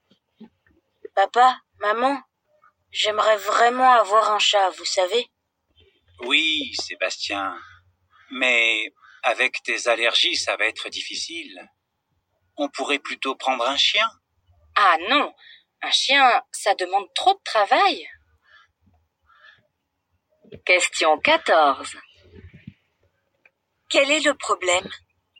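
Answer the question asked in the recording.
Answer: Sébastien est allergique aux chats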